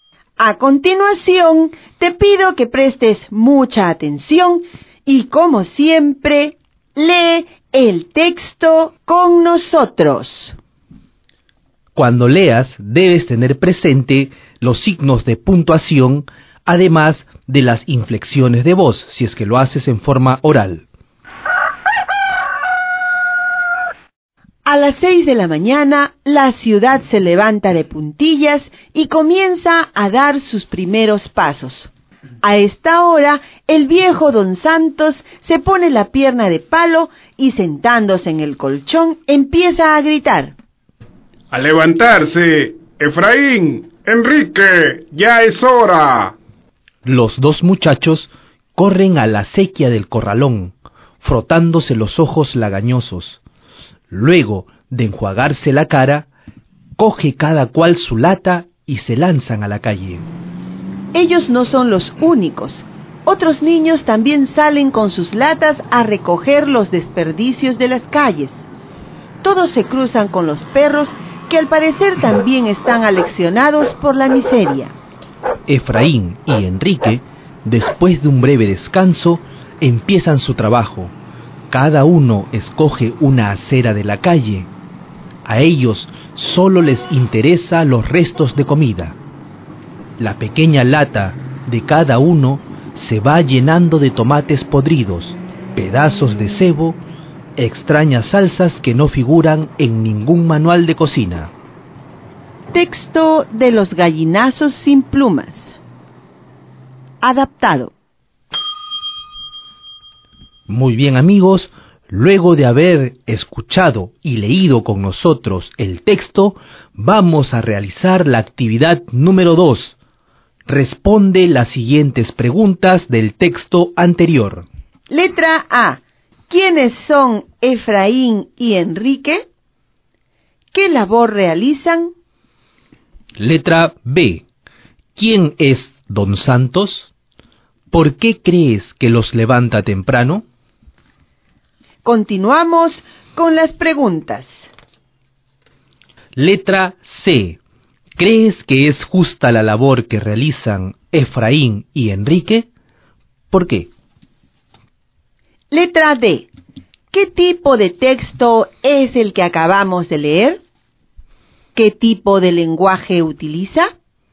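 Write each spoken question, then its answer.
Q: ¿Quiénes son Efraín y Enrique?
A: Dos muchachos que recogen desperdicios de las calles

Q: ¿Qué labor realizan?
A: Recogen restos de comida de la basura de las calles en sus latas

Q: ¿Quién es Don Santos?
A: Un viejo con pierna de palo que despierta a los muchachos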